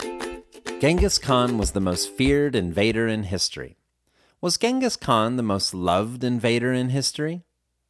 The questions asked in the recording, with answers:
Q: Was Genghis Khan the most loved invader in history?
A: No, Genghis Khan wasn't the most loved invader in history.